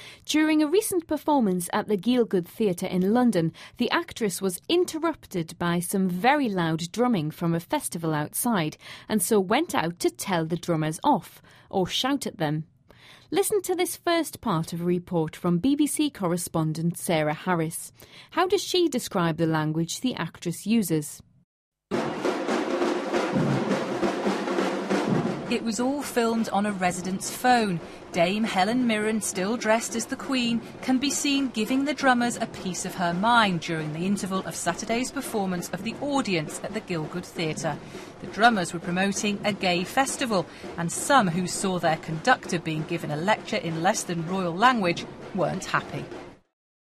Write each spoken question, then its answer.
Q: How does she describe the language the actress uses?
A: The reporter referred to it as less than royal language.